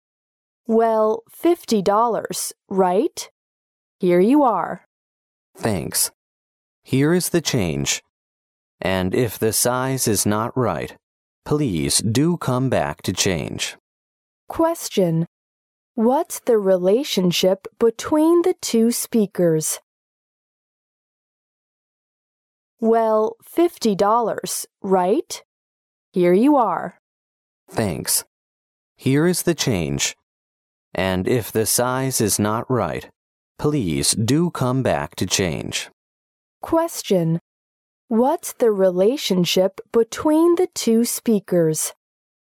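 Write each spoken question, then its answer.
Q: What's the relationship between the two speakers?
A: Customer and shop assistant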